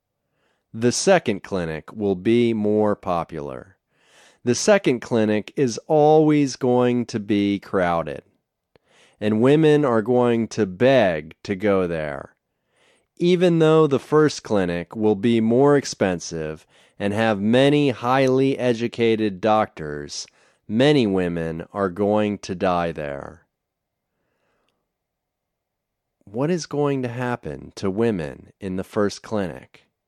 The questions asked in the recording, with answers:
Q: What is going to happen to women in the first clinic?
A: Women in the first clinic are going to die.